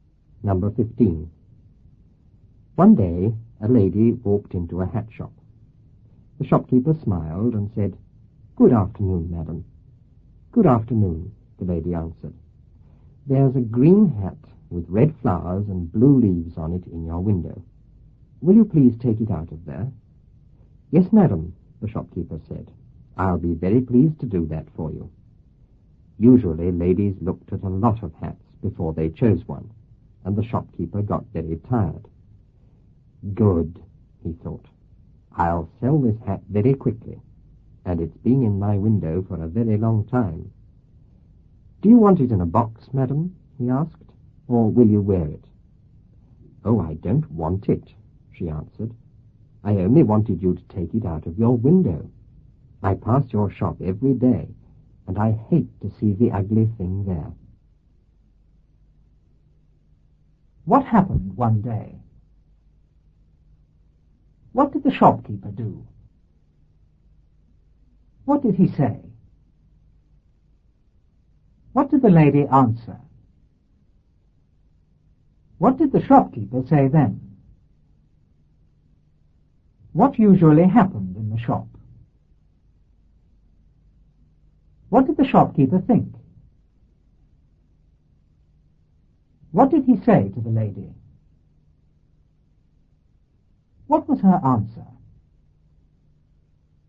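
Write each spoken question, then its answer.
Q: What happened one day?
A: A lady walked into a hat shop.

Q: What did the shopkeeper do?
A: He smiled and said good afternoon.

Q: What did he say?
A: "Good afternoon, madam."

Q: What did the shopkeeper say then?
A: "Yes, madam. I'll be very pleased to do that for you."

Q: What usually happened in the shop?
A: Ladies looked at a lot of hats before choosing one, and the shopkeeper got very tired.

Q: What did the shopkeeper think?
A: He would sell this hat very quickly; it had been in the window a long time.

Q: What did he say to the lady?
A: "Do you want it in a box, madam, or will you wear it?"

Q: What was her answer?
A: She didn't want it; she only wanted it out of the window because she hated seeing the ugly thing every day.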